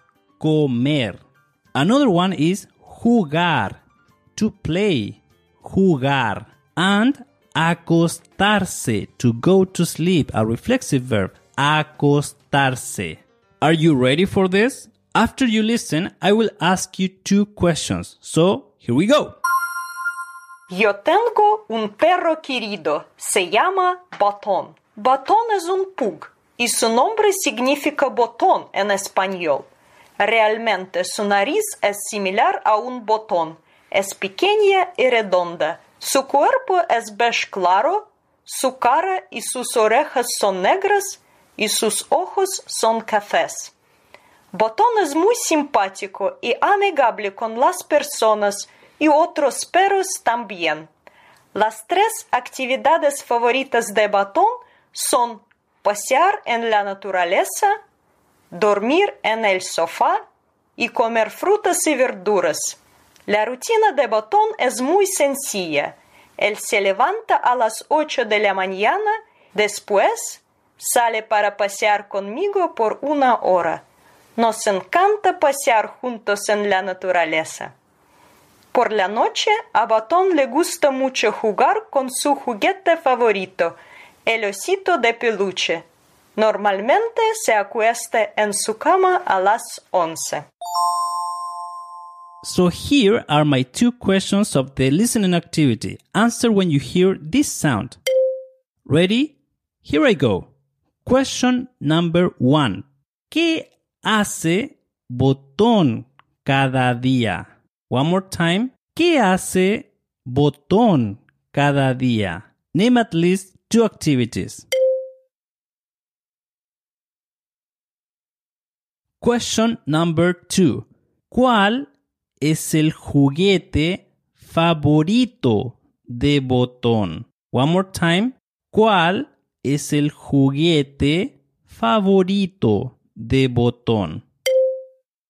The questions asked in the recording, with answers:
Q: ¿Cuál es el juguete favorito de Botón?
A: It was a osito de peluche.